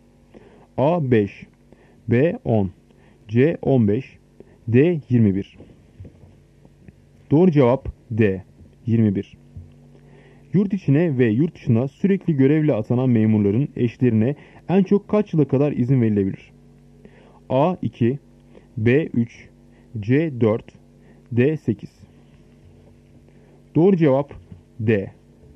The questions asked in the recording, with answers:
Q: Yurt içine ve yurt dışına sürekli görevle atanan memurların eşlerine en çok kaç yıla kadar izin verilebilir?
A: Doğru cevap D. 8.